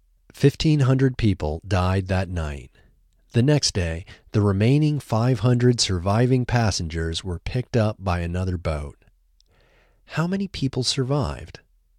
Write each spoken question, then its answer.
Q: How many people survived?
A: 500 people survived.